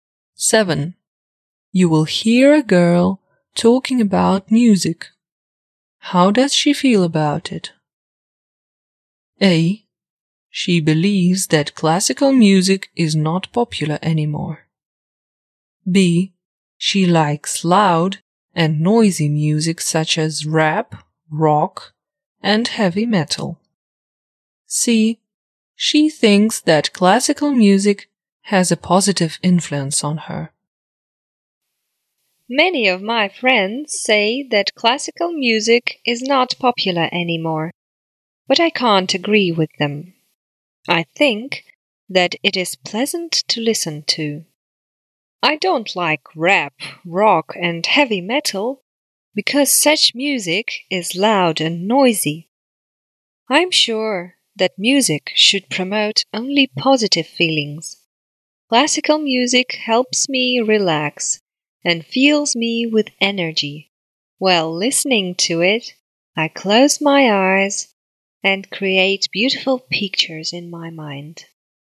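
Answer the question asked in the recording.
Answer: C: She thinks that classical music has a positive influence on her.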